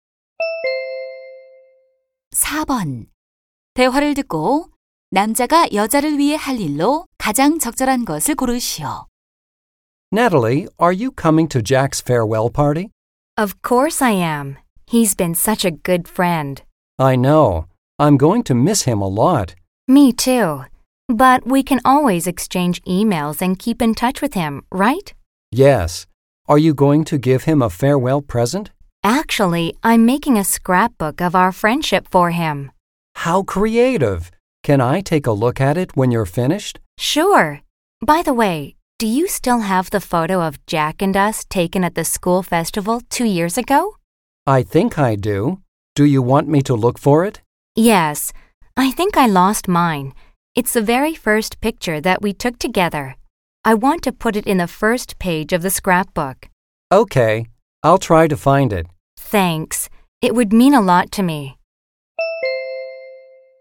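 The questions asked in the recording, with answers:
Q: 대화를 듣고 남자가 여자를 위해 할 일로 가장 적절한 것을 고르시오.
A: 학교 축제 때 찍은 사진 찾기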